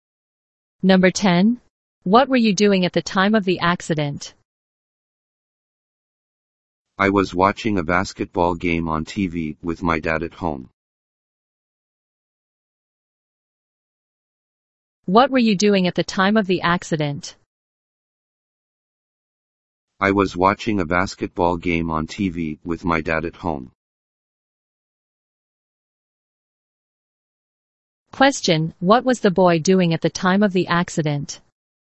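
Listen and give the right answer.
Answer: Watching a basketball game on TV with his dad at home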